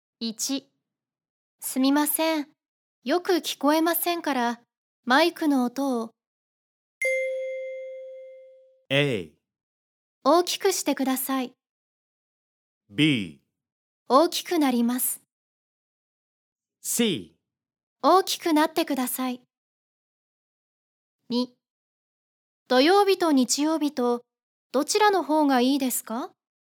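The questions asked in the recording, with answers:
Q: すみません。よく聞こえませんから、マイクの音を。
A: A: 大きくしてください。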